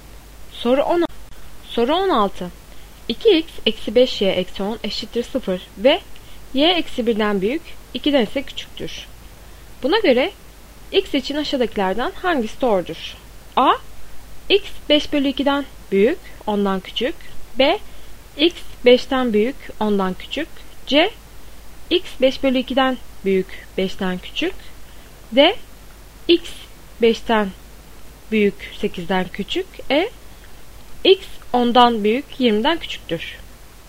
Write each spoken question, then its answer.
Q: Buna göre x için aşağıdakilerden hangisi doğrudur?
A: Doğru cevap A. x 5 bölü 2'den büyük 10'dan küçüktür.